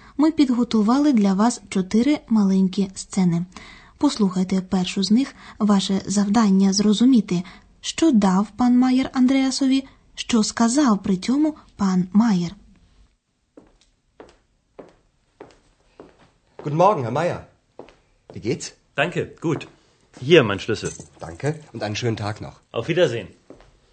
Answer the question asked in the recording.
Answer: Пан Майер кладе на стіл свого ключа і каже: Hier, mein Schlüssel.